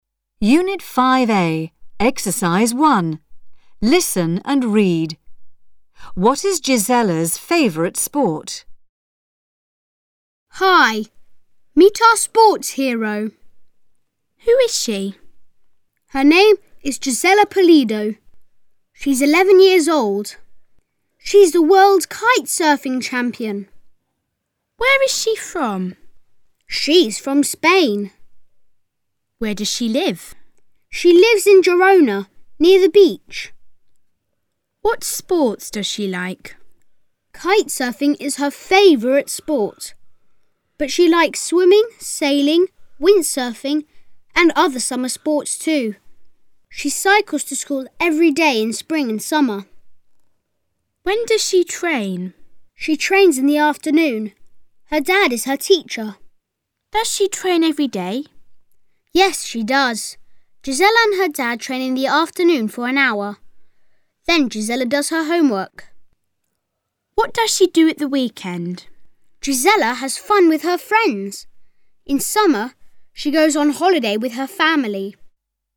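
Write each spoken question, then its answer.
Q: What is Gisella's favourite sport?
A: Kite surfing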